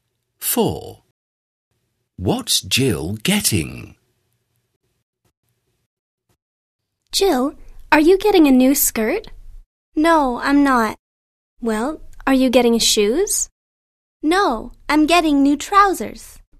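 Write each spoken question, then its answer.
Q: What's Jill getting?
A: New trousers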